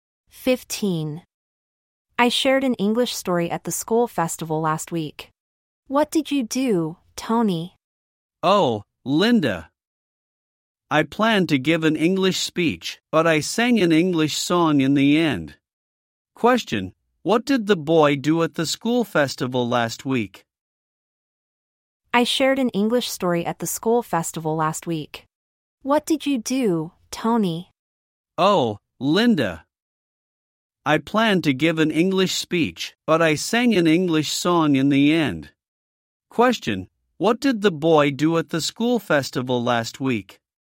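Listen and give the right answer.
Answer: He sang an English song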